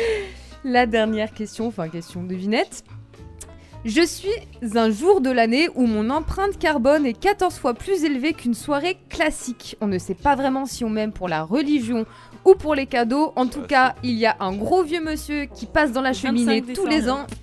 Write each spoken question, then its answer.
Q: Je suis un jour de l'année où mon empreinte carbone est 14 fois plus élevée qu'une soirée classique.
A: Ouais, c'est le Noël. C'est le Noël.